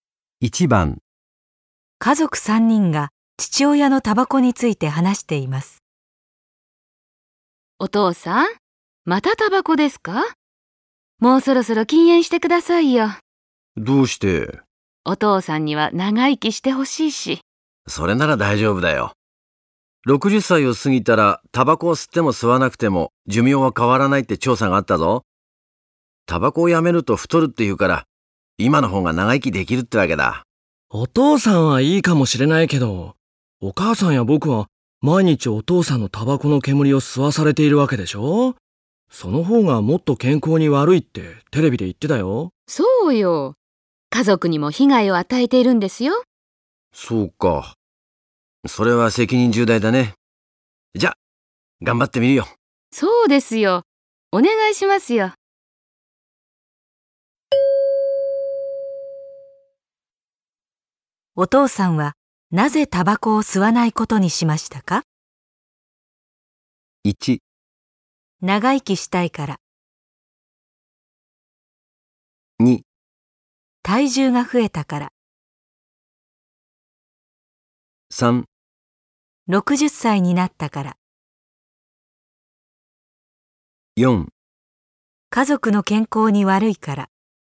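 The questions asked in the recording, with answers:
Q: お父さんはなぜタバコを吸わないことにしましたか?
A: 4: 家族の健康に悪いから。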